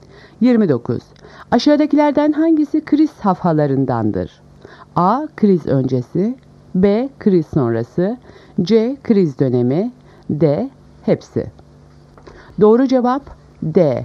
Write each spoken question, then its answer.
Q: Aşağıdakilerden hangisi kriz safhalarındandır?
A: Doğru cevap D. Hepsi.